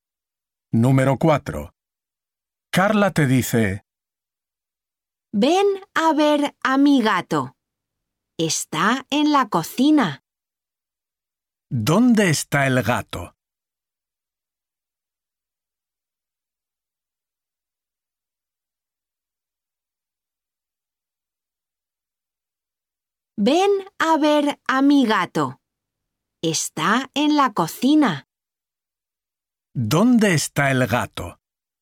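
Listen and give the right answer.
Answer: En la cocina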